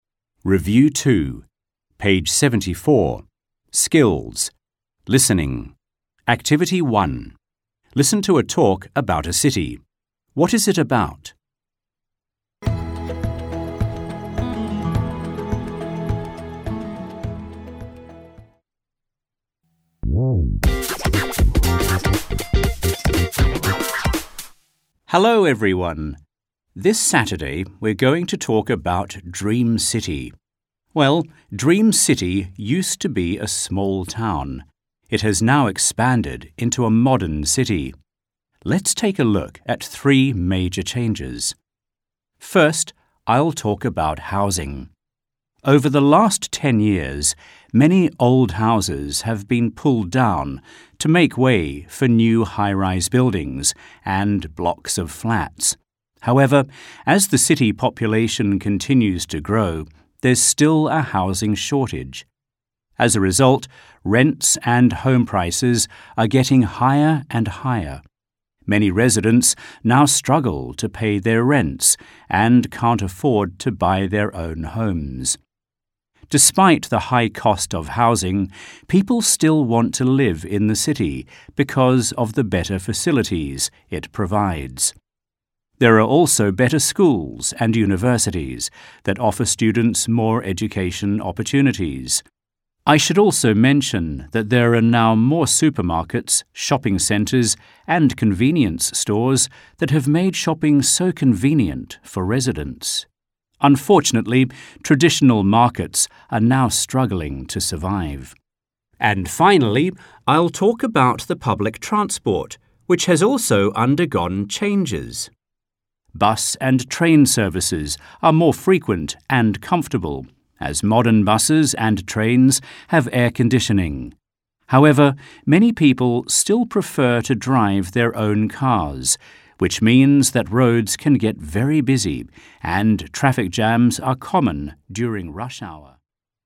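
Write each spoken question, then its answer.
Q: What is it about?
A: How Dream City has changed from a small town into a modern city (changes in housing, facilities and public transport)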